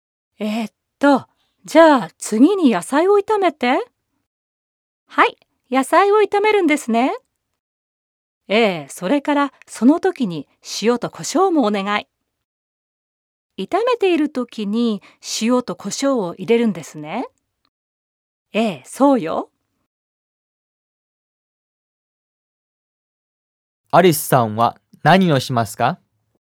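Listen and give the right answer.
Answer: 野菜を炒めながら塩と胡椒を入れる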